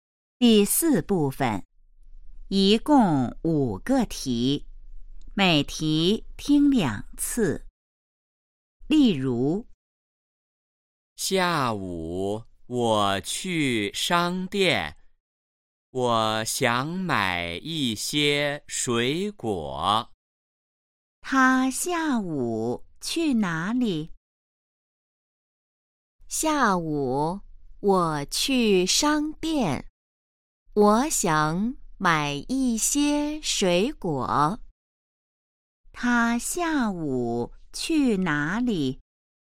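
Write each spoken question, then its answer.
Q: 他下午去哪里?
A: 商店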